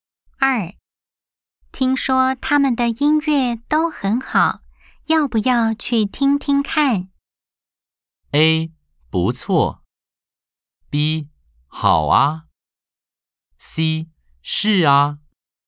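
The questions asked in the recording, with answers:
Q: 听说他们的音乐都很好,要不要去听听看?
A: B: 好啊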